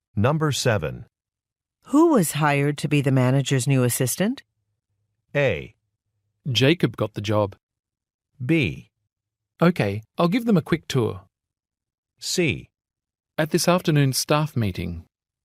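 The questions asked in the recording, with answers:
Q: Who was hired to be the manager's new assistant?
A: A: Jacob got the job.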